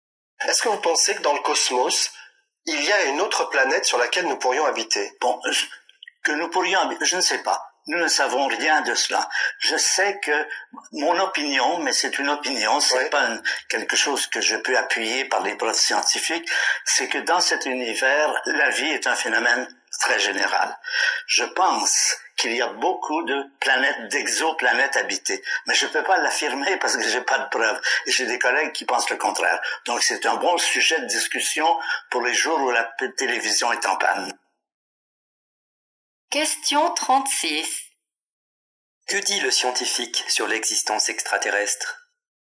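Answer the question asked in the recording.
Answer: Il pense que la vie est très répandue et qu'il y a beaucoup d'exoplanètes habitées, mais il n'a pas de preuves.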